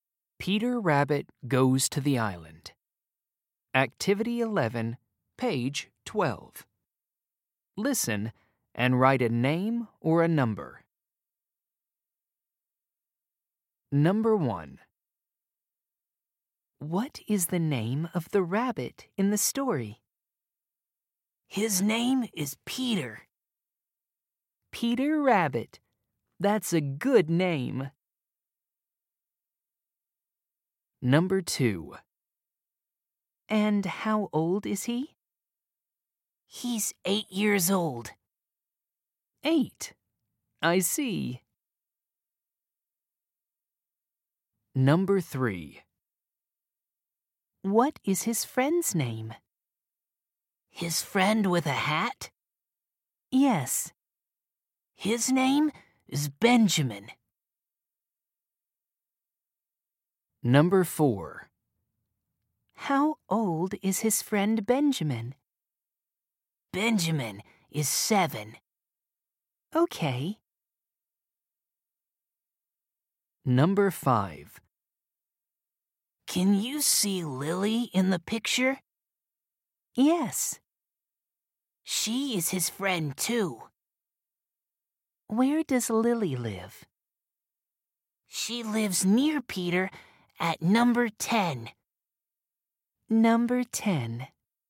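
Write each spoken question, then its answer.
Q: What is the name of the rabbit in the story?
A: Peter

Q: What is his friend's name?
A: Benjamin

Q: Where does Lily live?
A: number 10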